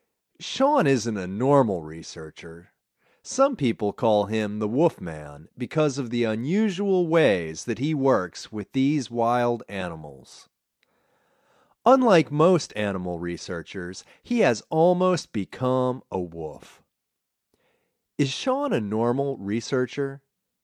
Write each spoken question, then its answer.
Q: Is Sean a normal researcher?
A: No, Sean isn't a normal researcher.